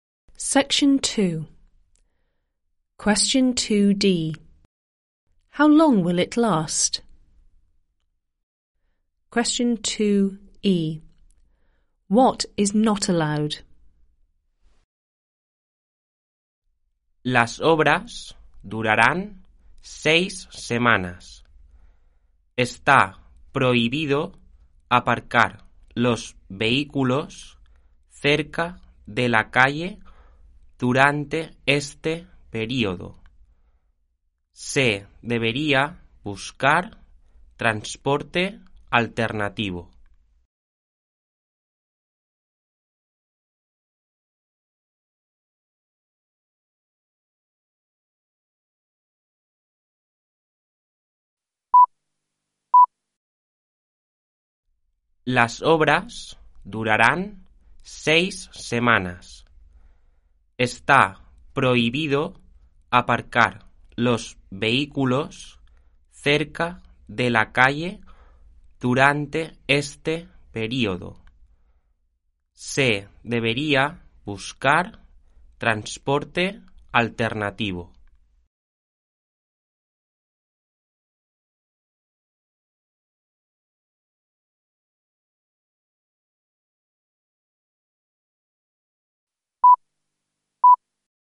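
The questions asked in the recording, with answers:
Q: How long will it last?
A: 6 weeks

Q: What is not allowed?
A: Parking vehicles near the street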